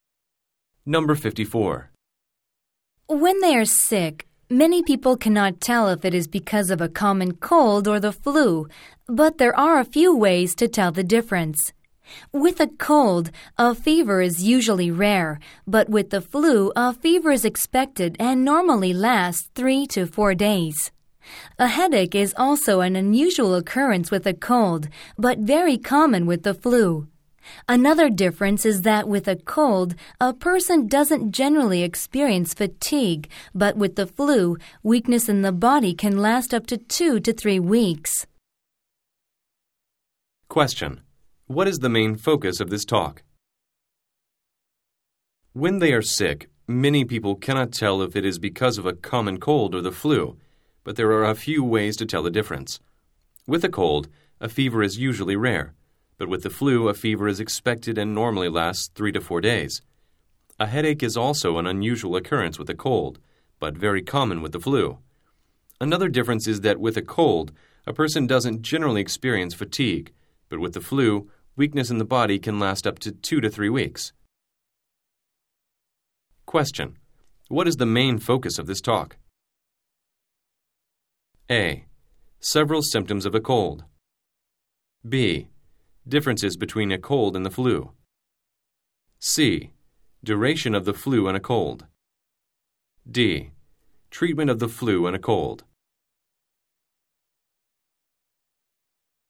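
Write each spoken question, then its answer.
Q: What is the main focus of this talk?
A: B: Differences between a cold and the flu.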